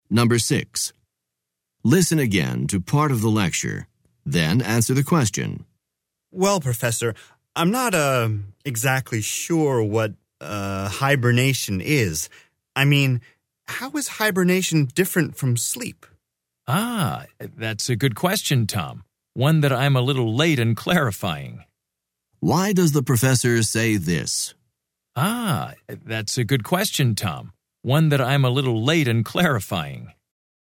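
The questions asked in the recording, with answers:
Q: Why does the professor say this?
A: He admits he should have explained the difference between hibernation and sleep earlier.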